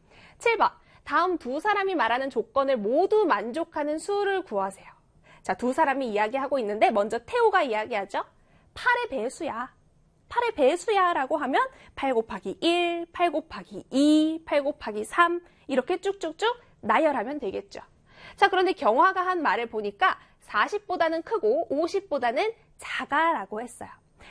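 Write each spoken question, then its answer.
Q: 다음 두 사람이 말하는 조건을 모두 만족하는 수를 구하세요.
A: 48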